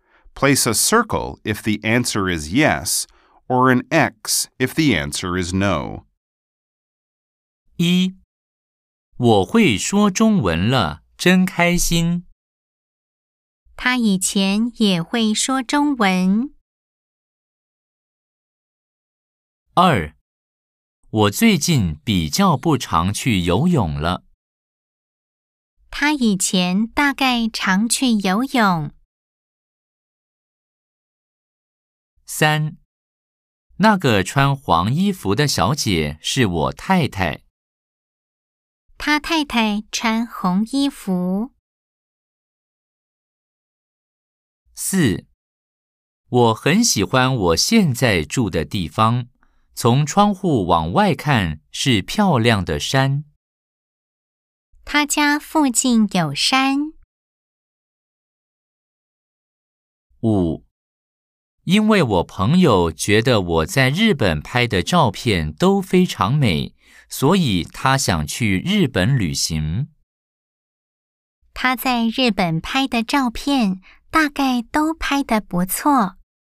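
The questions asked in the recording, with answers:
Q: 他以前也会说中文。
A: 不对 (X)

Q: 她太太穿红衣服。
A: 不对 (X)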